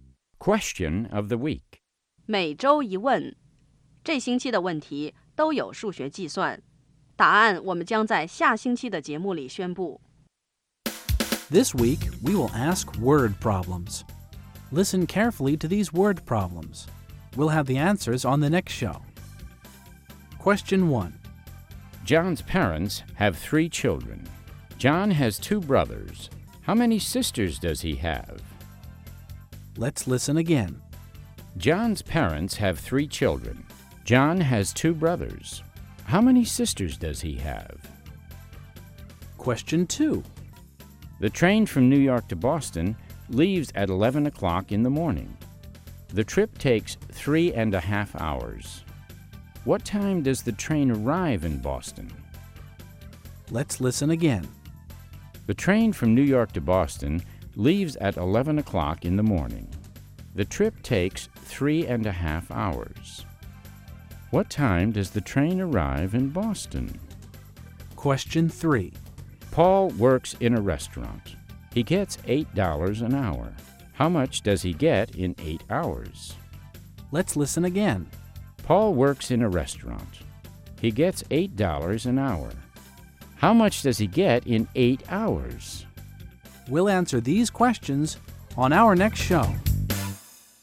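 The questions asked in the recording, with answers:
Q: John's parents have 3 children. John has 2 brothers. How many sisters does he have?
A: None (0)

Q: The train from New York to Boston leaves at 11 o'clock in the morning. The trip takes 3.5 hours. What time does the train arrive in Boston?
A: 2:30 in the afternoon

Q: Paul works in a restaurant. He gets $8 an hour. How much does he get in 8 hours?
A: $64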